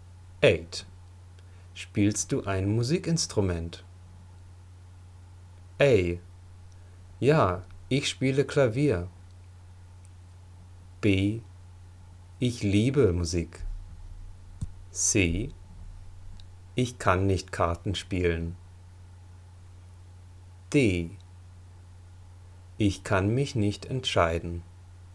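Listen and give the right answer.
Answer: A: Ja, ich spiele Klavier.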